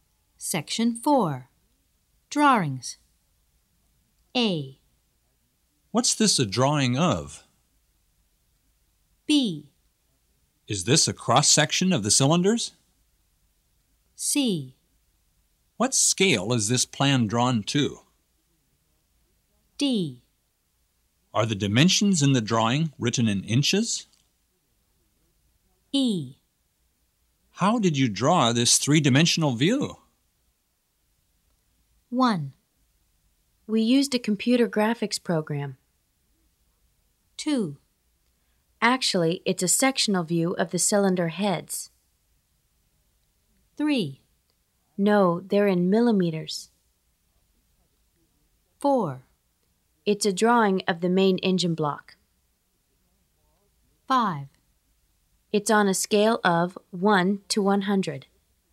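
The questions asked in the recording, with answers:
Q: What's this a drawing of?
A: 4: It's a drawing of the main engine block.

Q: Is this a cross-section of the cylinders?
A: 2: Actually, it's a sectional view of the cylinder heads.

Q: What scale is this plan drawn to?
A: 5: It's on a scale of 1 to 100.

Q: Are the dimensions in the drawing written in inches?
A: 3: No, they're in millimeters.

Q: How did you draw this three-dimensional view?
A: 1: We used a computer graphics program.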